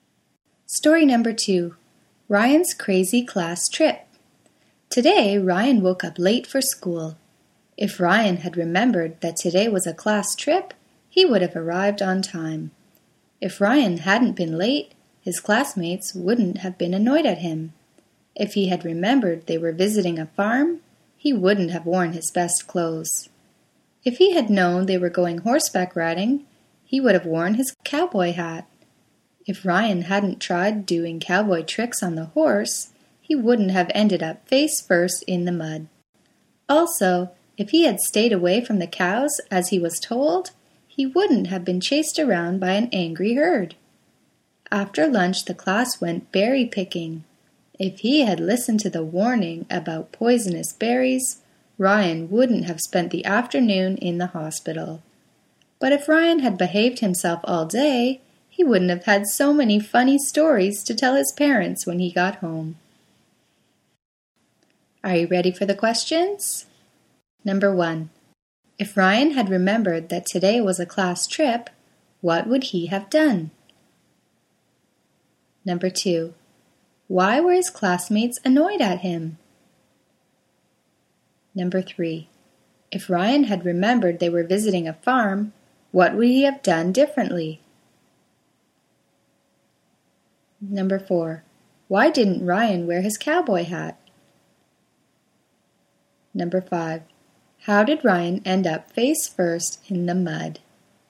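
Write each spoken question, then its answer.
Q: If Ryan had remembered that today was a class trip, what would he have done?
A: He would have arrived on time.

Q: Why were his classmates annoyed at him?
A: Because he was late.

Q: If Ryan had remembered they were visiting a farm, what would he have done differently?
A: He wouldn't have worn his best clothes.

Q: Why didn't Ryan wear his cowboy hat?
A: He didn't know they were going horseback riding.

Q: How did Ryan end up face first in the mud?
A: He tried doing cowboy tricks on the horse.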